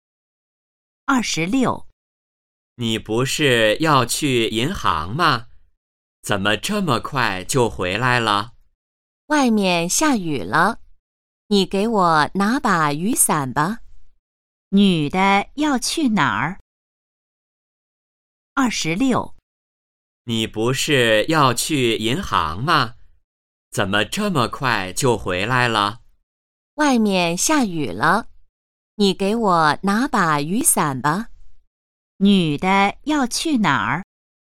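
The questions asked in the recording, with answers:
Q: 女的要去哪儿?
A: 银行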